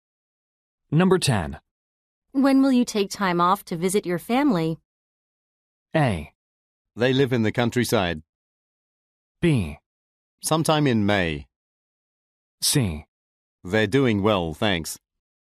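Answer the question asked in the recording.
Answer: B: Sometime in May.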